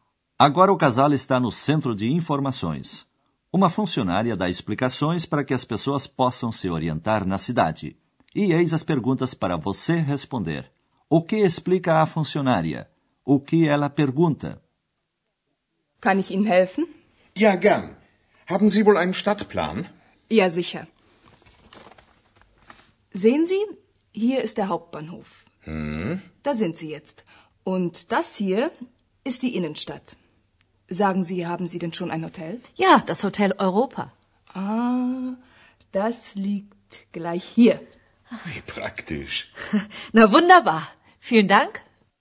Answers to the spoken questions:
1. A funcionária mostra um mapa e explica onde o casal se encontra.
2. E ela pergunta se os dois já têm um hotel.